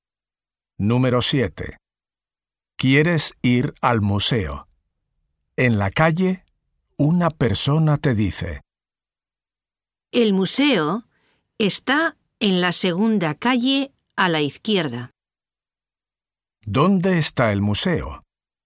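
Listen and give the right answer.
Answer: En la segunda calle a la izquierda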